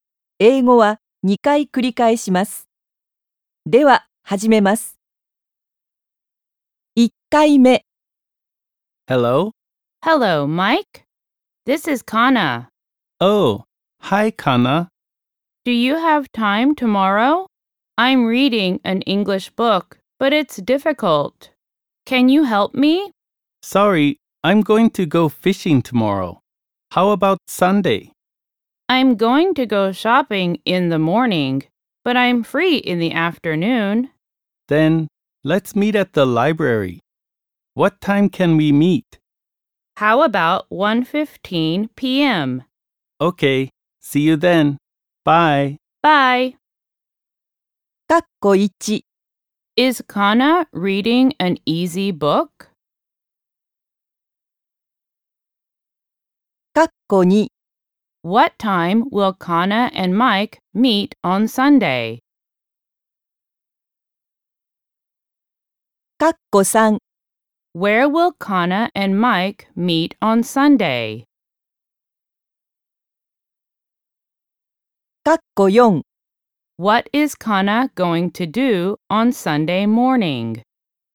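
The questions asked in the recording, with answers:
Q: Is Kana reading an easy book?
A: No, it's difficult.

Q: What time will Kana and Mike meet on Sunday?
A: At 1:15 p.m.

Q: Where will Kana and Mike meet on Sunday?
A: At the library.

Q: What is Kana going to do on Sunday morning?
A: She is going to go shopping.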